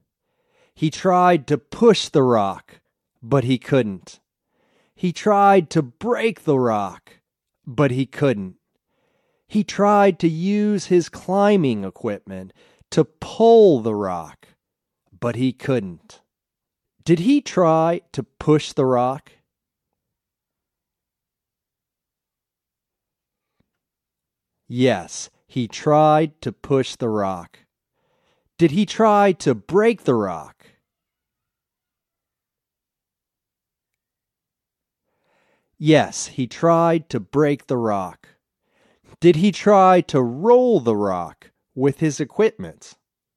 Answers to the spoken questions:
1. Yes, he tried to push the rock.
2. Yes, he tried to break the rock.
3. No, he didn't try to roll the rock with his equipment.